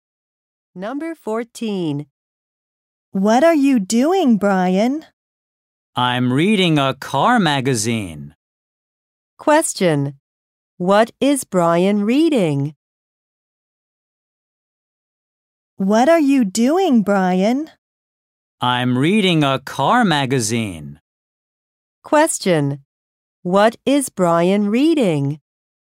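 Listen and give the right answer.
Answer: A car magazine.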